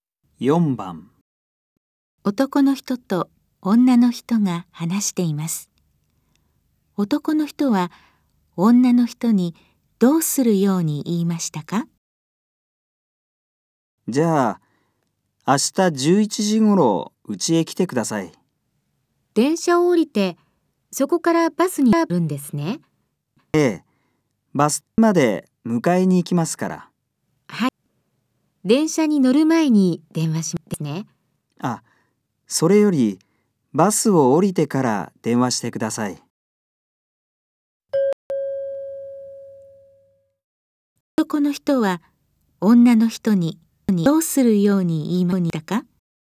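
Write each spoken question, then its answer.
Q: 男の人は女の人にどうするように言いましたか?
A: バスを降りてから電話する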